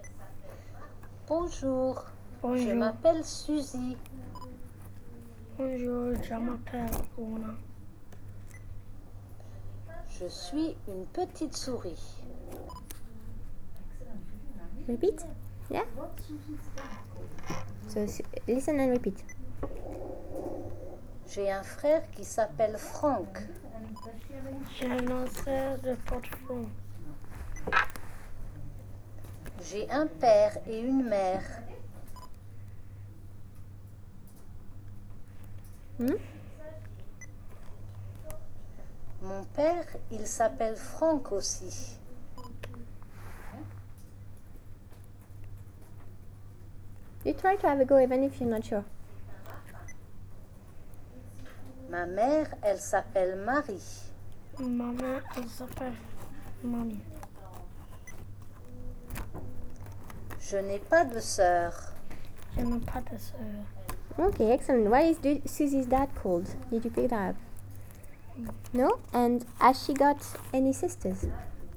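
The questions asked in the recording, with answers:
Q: Why is Susie's dad called?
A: Franck

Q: And has she got any sisters?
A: No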